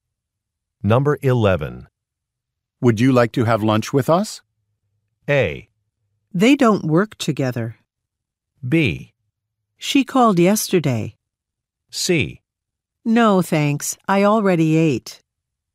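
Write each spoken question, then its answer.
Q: Would you like to have lunch with us?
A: C: No, thanks. I already ate.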